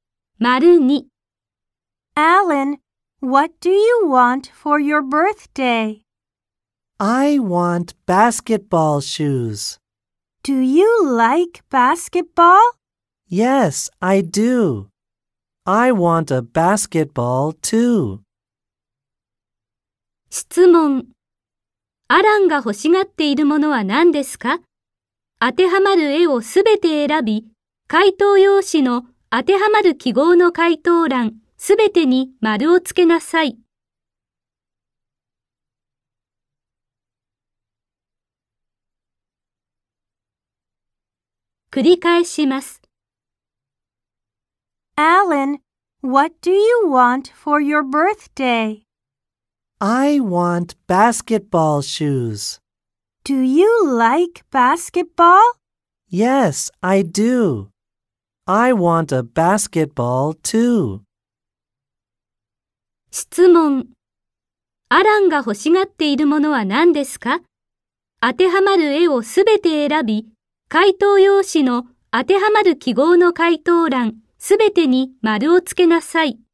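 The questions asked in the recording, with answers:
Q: アランが欲しがっているものは何ですか?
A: バスケットボールシューズとバスケットボール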